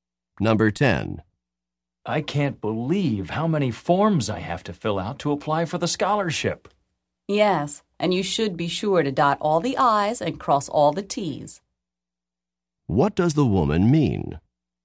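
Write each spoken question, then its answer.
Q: What does the woman mean?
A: He should fill out the forms carefully and completely.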